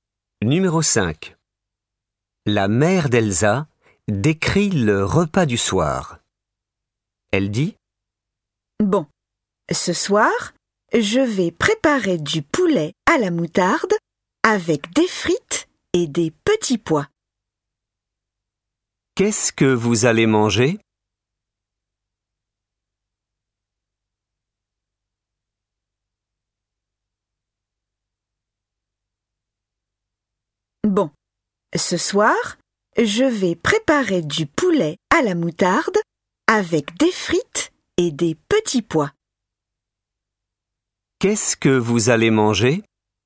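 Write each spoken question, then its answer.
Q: Qu'est-ce que vous allez manger ?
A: Du poulet à la moutarde avec des frites et des petits pois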